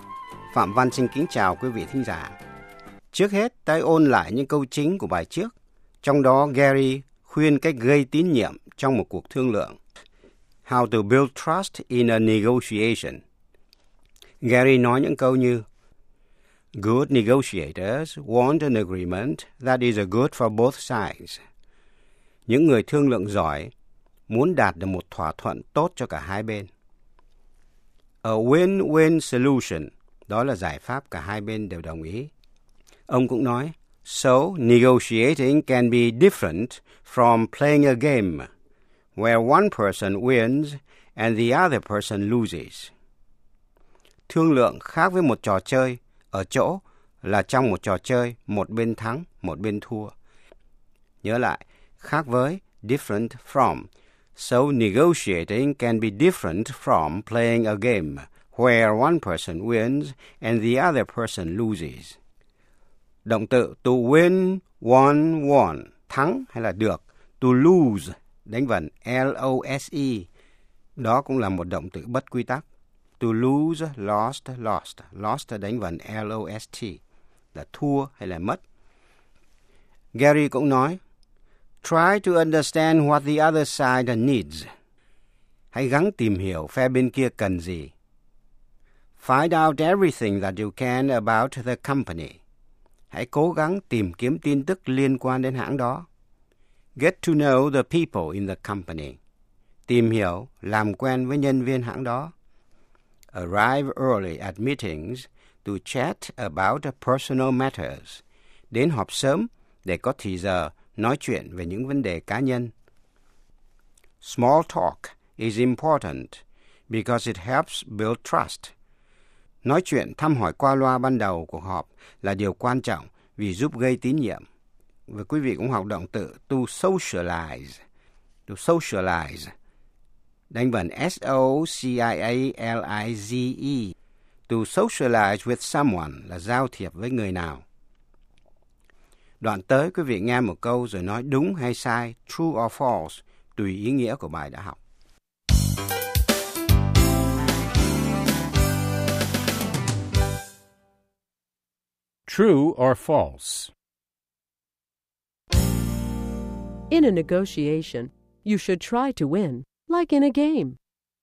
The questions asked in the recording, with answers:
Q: In a negotiation, you should try to win, like in a game.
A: False. The goal should be an agreement that will help both sides.